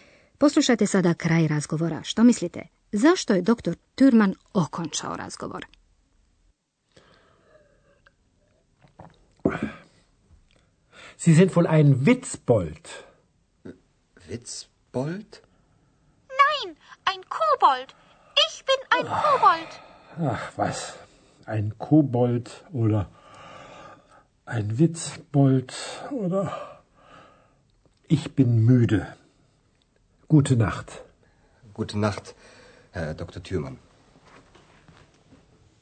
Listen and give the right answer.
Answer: Dr. Thürmann završava razgovor jer je umoran.